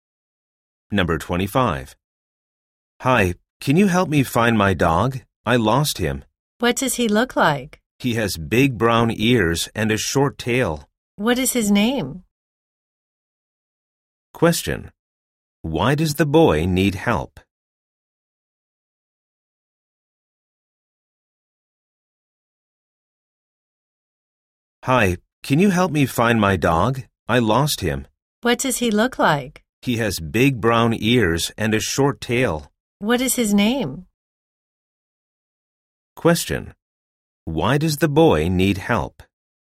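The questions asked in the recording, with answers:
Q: Why does the boy need help?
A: He lost his dog.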